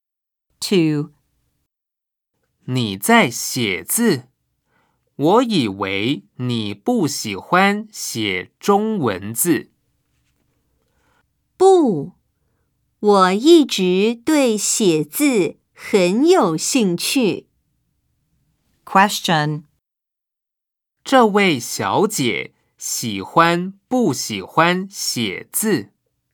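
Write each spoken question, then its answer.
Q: 这位小姐喜欢不喜欢写字?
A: 喜欢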